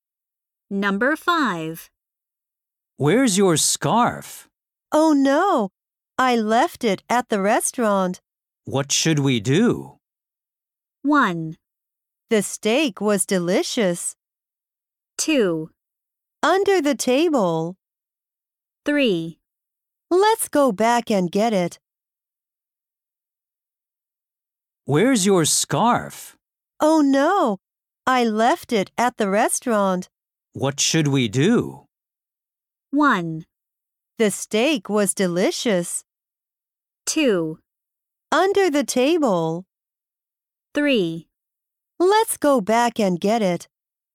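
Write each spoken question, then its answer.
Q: What should we do?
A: 3: Let's go back and get it.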